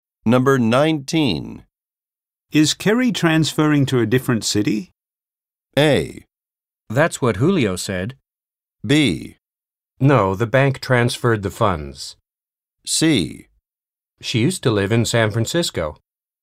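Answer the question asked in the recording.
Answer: A: That's what Julio said.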